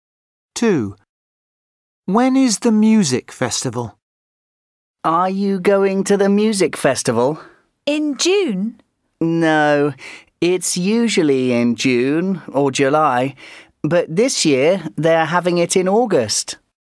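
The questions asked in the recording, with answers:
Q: When is the music festival?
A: in August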